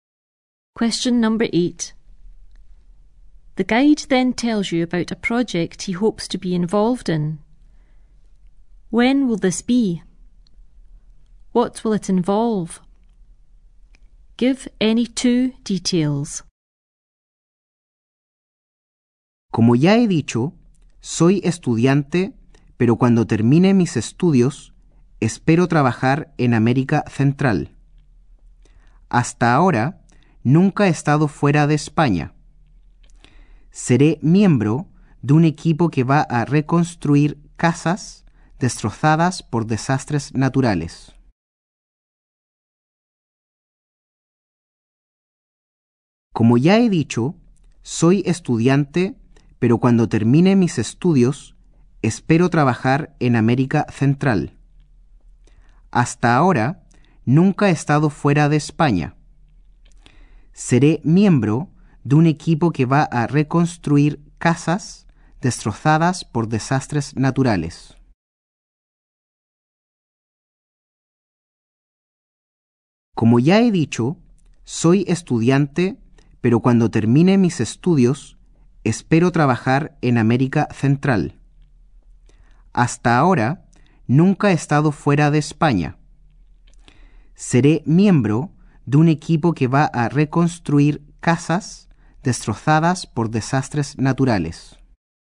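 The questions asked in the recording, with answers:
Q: When will this be?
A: When he finishes his studies

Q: What will it involve?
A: Working in Central America in a team rebuilding houses destroyed by natural disasters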